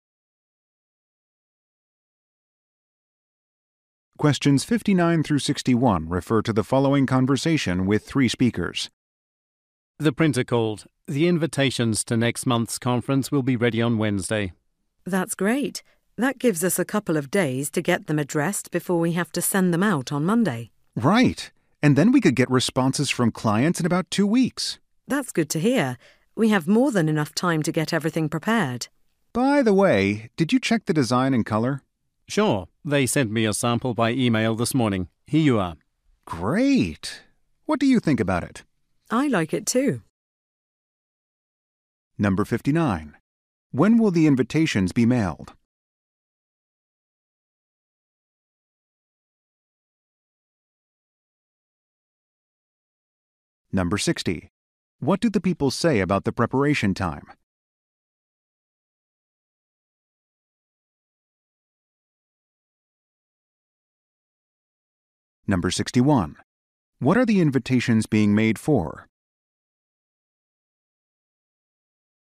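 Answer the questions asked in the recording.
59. On Monday
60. There is more than enough time
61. Next month's conference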